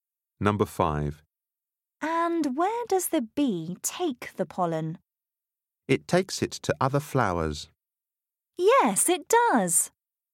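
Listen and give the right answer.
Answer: to other flowers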